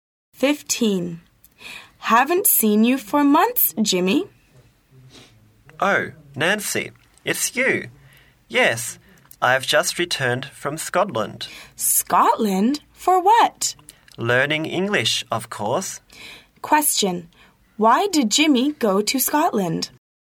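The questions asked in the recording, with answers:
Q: Why did Jimmy go to Scotland?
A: To learn English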